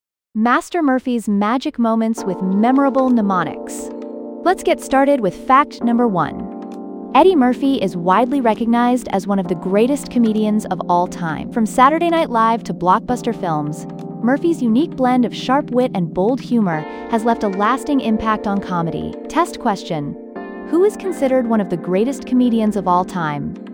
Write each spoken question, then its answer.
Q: who is considered one of the greatest comedians of all time?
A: Eddie Murphy.